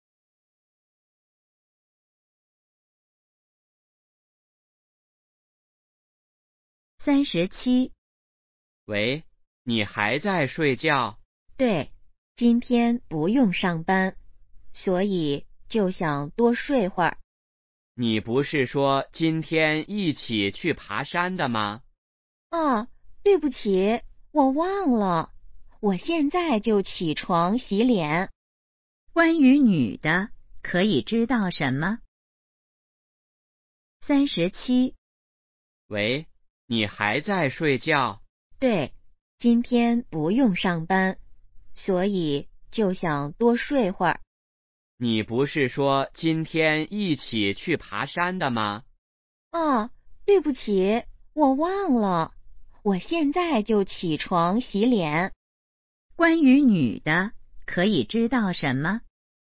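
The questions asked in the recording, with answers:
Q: 关于女的,可以知道什么?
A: 她忘了今天去爬山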